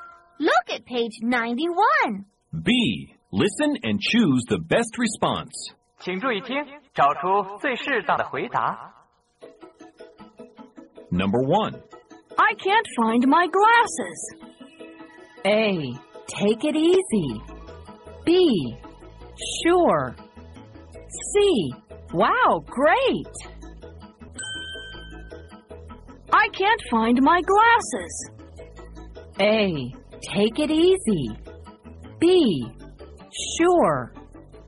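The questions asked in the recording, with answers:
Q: I can't find my glasses.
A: A: Take it easy.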